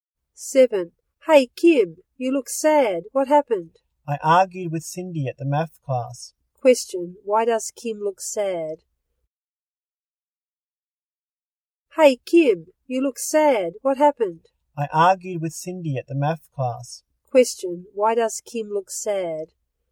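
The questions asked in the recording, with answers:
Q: Question, why does Kim look sad?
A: She argued with Cindy at the math class.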